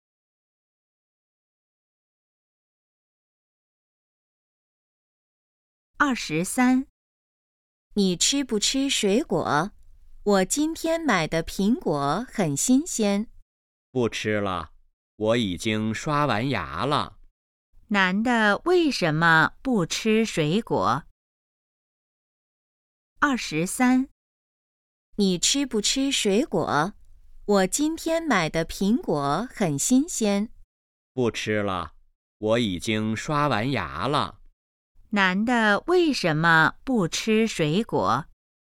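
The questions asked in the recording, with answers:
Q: 男的为什么不吃水果?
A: 已经刷完牙了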